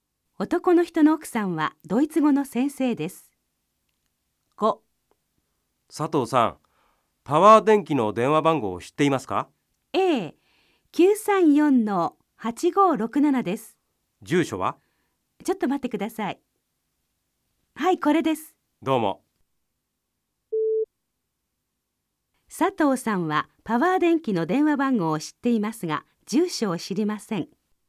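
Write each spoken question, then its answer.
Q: 佐藤さんはパワー電気の電話番号を知っていますが、住所を知りません。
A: 正しくない(住所も知っている)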